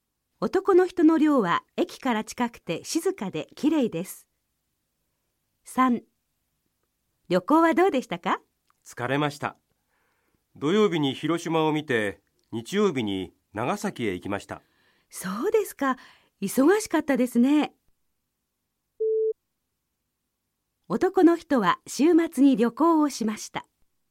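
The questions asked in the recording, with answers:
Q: 男の人は週末に旅行をしました。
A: ○(土曜日に広島、日曜日に長崎へ行った)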